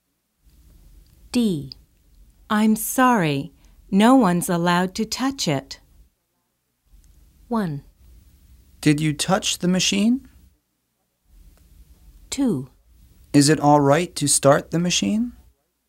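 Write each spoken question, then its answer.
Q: I'm sorry, no one's allowed to touch it.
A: 2: Is it all right to start the machine?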